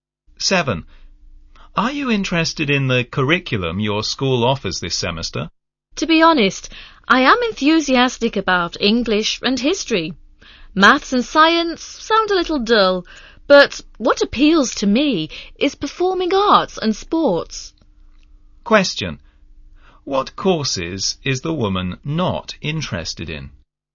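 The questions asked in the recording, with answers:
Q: What courses is the woman not interested in?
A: Maths and science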